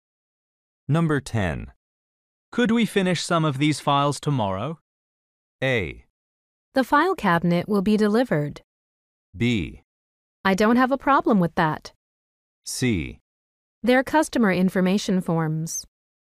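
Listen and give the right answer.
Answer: B: I don't have a problem with that.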